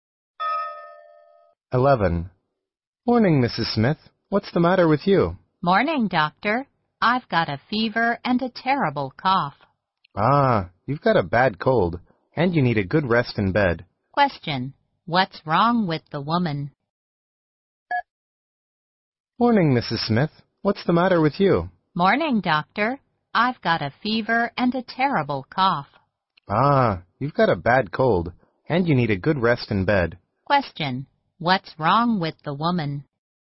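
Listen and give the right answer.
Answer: She has a bad cold (fever and cough)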